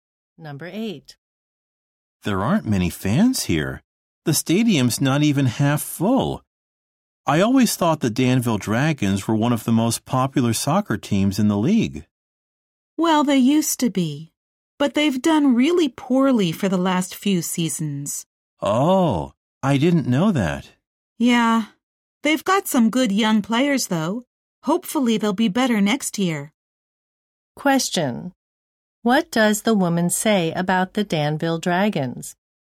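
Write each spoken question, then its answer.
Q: What does the woman say about the Danville Dragons?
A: They have done poorly for the last few seasons.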